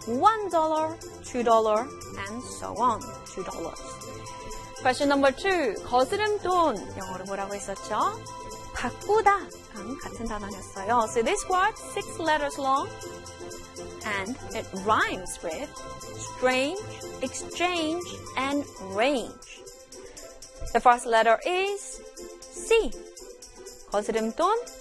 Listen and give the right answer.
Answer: Change. C-H-A-N-G-E. Change.